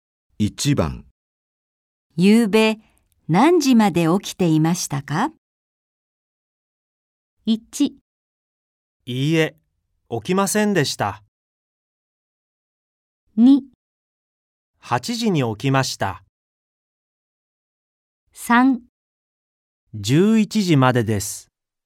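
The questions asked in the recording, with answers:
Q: ゆうべ何時まで起きていましたか?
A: 3: 11時までです。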